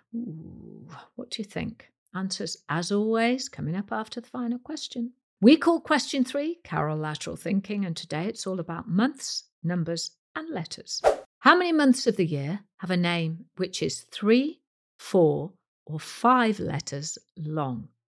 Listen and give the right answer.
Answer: And the answer is 5 months.